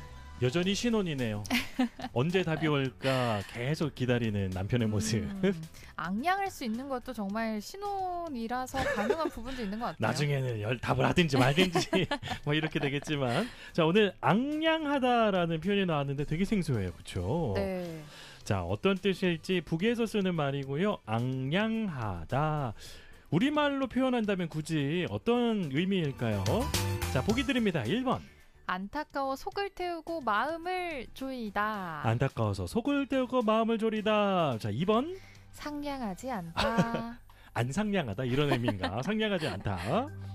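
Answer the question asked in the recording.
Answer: 1: 안타까워 속을 태우고 마음을 조이다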